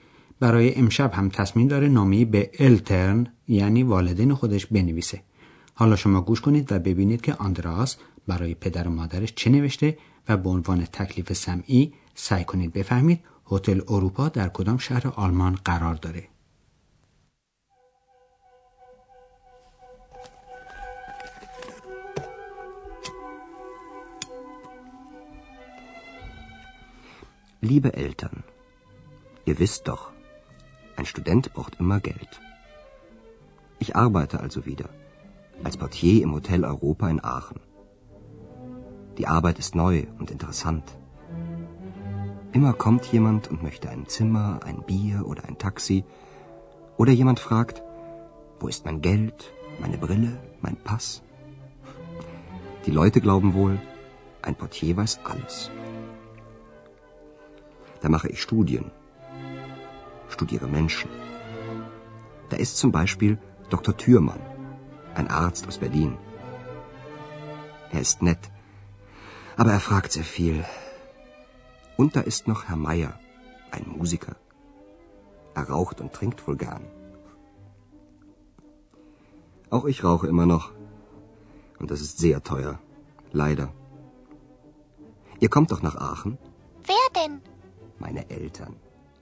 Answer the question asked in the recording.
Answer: بله، شما هم درست فهمیدید و هتل اروپا در شهر آخن هست که شهری است بسیار زیبا و قدیم.